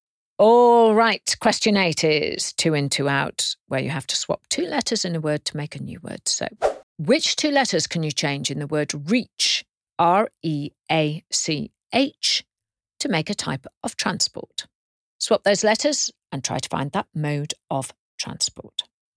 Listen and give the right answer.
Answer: Well, if you change the R to a C and the E to an O, you get a coach, C-O-A-C-H.